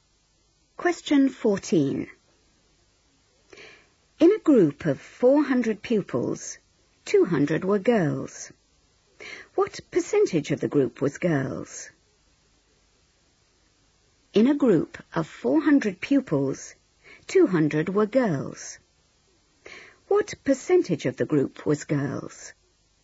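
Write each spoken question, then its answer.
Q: What percentage of the group was girls?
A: 50%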